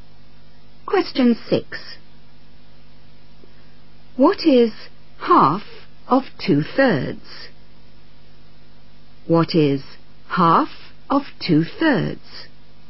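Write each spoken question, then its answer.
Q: What is half of 2/3?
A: 1/3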